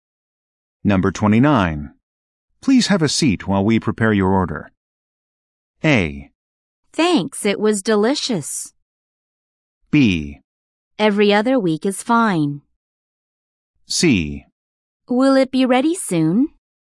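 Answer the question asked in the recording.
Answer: C: Will it be ready soon?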